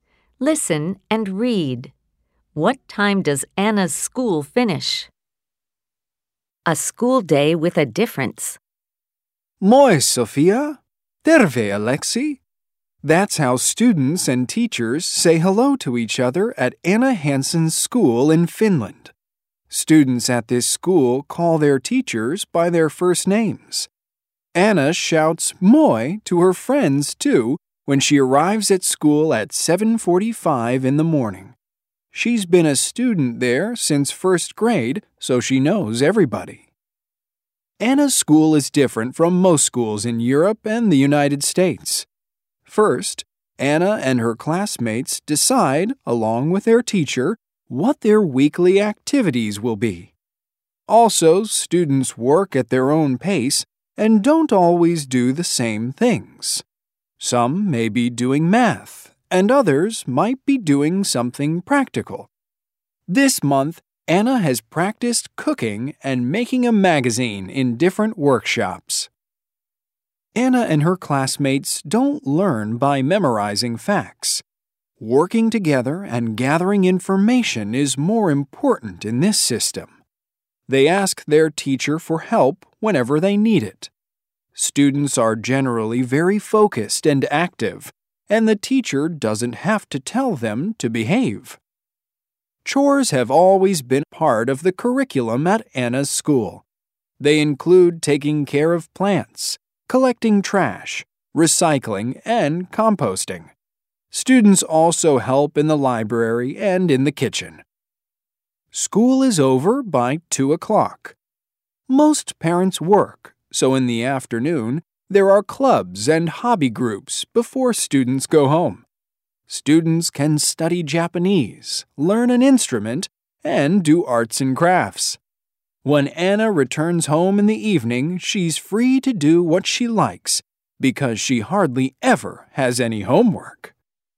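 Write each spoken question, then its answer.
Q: What time does Anna's school finish?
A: By 2 o'clock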